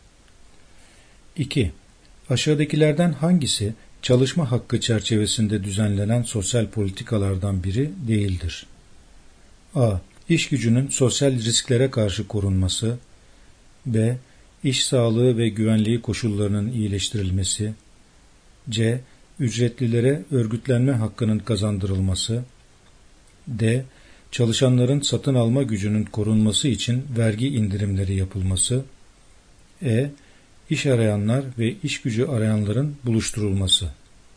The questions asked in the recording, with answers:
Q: Aşağıdakilerden hangisi çalışma hakkı çerçevesinde düzenlenen sosyal politikalardan biri değildir?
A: Yanıt D. Çalışanların satın alma gücünün korunması için vergi indirimleri yapılması.